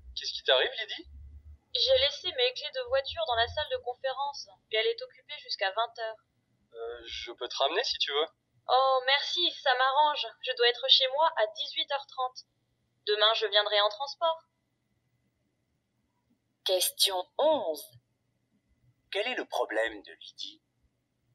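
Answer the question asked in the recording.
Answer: Elle a laissé ses clés de voiture dans la salle de conférence, occupée jusqu'à 20h.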